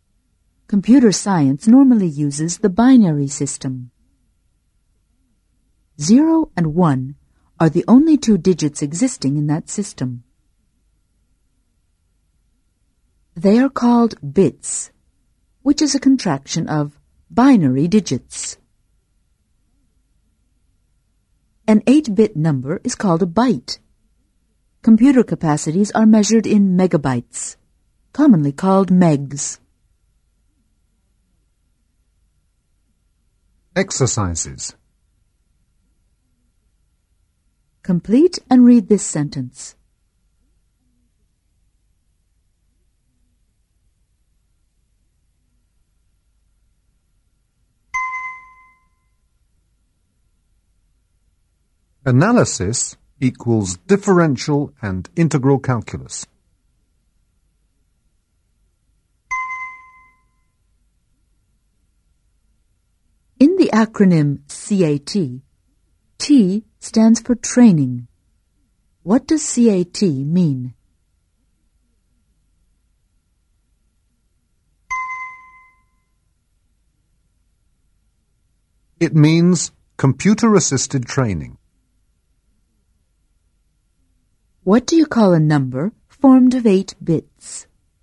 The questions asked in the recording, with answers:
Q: What do you call a number formed of 8 bits?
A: It is an 8-bit byte, or simply a byte.